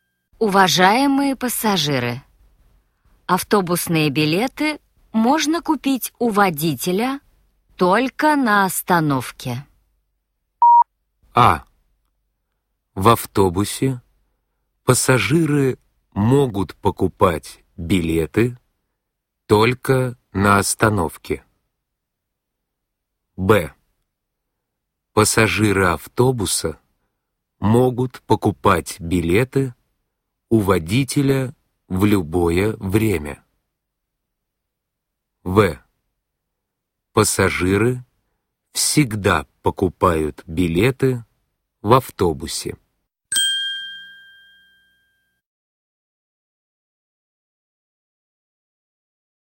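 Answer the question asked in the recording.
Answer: А: В автобусе пассажиры могут покупать билеты только на остановке.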